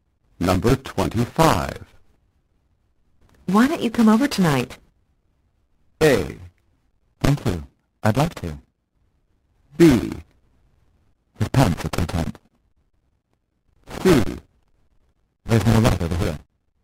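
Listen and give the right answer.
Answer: A: Thank you. I'd love to.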